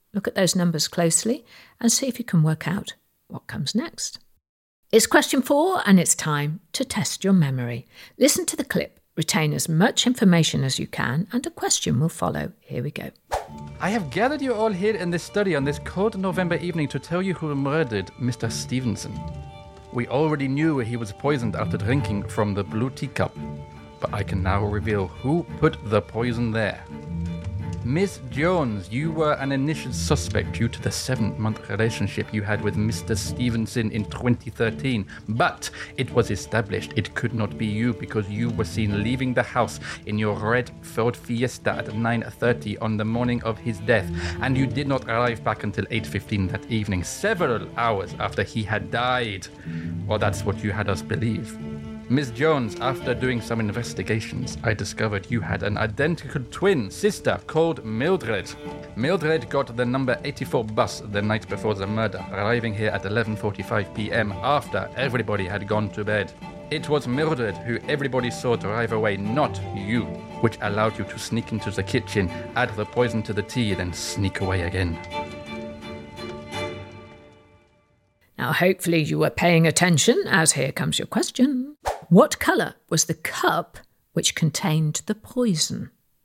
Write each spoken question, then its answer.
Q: What colour was the cup which contained the poison?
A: the cup was blue